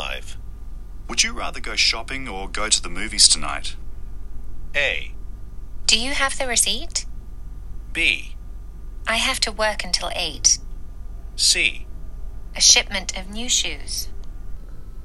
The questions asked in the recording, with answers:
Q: Would you rather go shopping or go to the movies tonight?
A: 8時まで仕事しないといけないんです。さあ、ちょっとひねった応答にはなりますが、これが今日の正答になります。